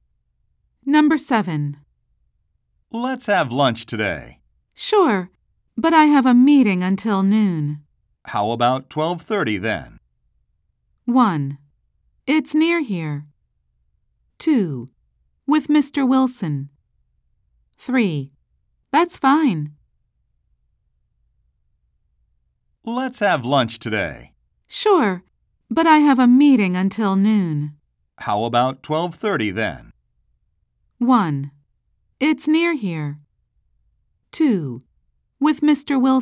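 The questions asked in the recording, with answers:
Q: How about 12:30 then?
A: 3: That's fine.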